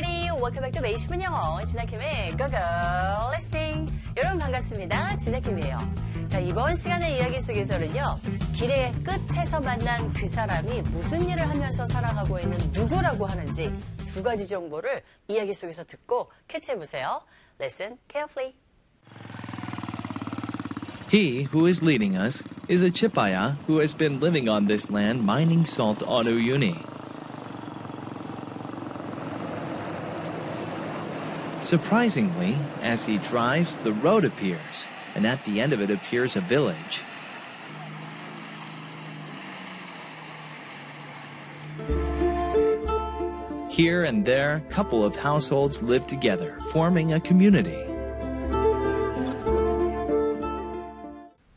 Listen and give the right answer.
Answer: 소금을 캐면서 살아가고 있는 누구? 치파야라고 불리는 사람이었습니다.